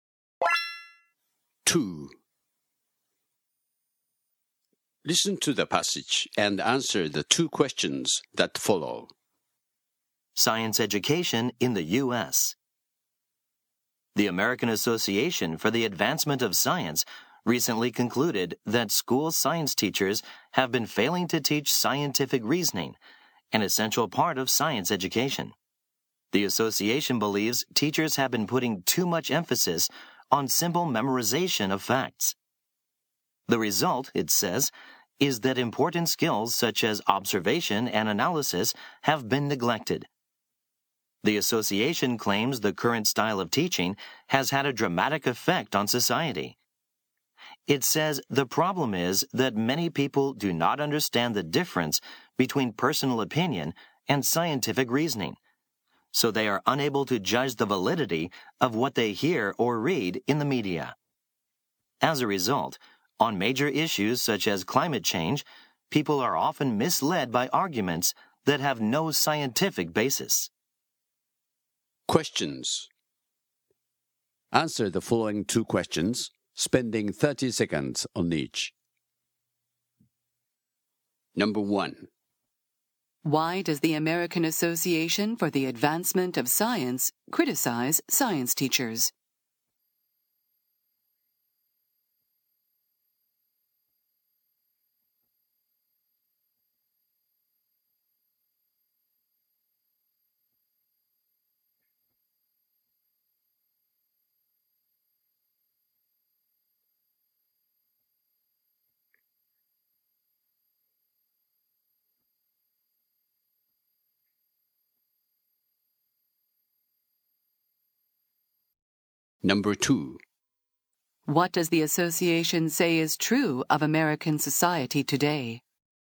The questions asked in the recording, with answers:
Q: why does the American Association for the Advancement of Science criticize science teachers?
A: They say that science teachers have been overemphasizing the memorization of facts and failing to teach scientific reasoning.

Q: What does the association say is true of American society today?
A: They say that many people do not know the difference between fact and opinion, which has led to their inability to make good judgments about information found in the media.